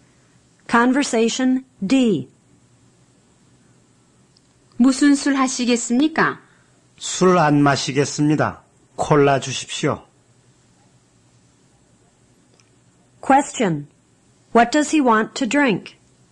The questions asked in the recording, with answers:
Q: What does he want to drink?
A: He wants to drink cola.